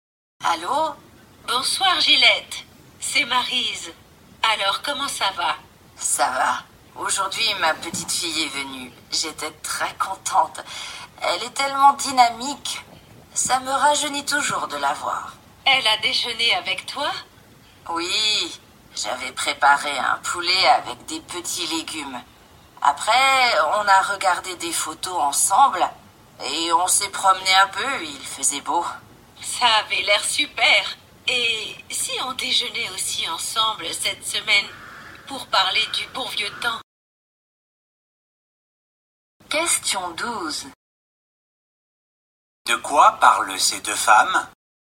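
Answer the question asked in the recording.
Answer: De la visite de la petite-fille de Gillette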